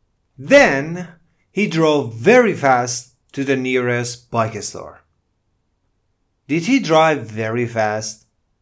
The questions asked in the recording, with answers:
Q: Did he drive very fast?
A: Yes, he drove very fast.